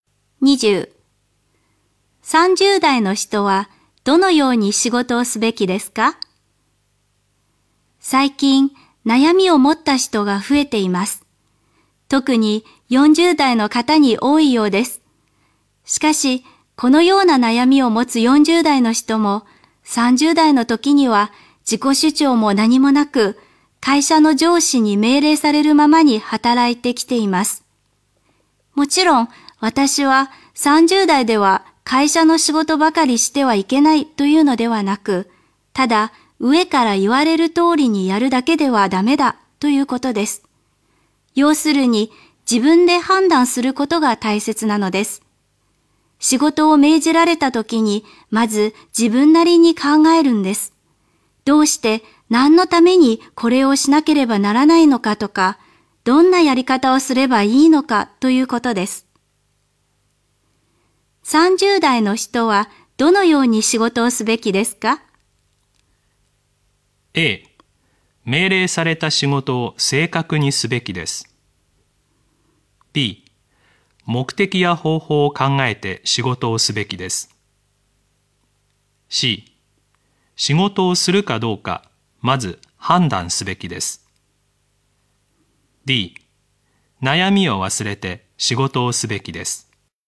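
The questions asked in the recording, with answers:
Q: 30代の人はどのように仕事をすべきですか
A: B: 目的や方法を考えて仕事をすべきです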